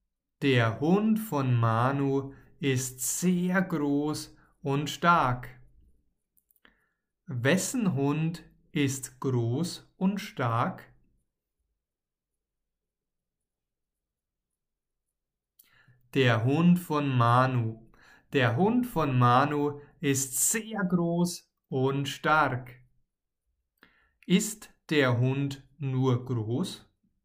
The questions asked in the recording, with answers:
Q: Ist der Hund nur groß?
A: Nein, er ist nicht nur groß, er ist groß und stark.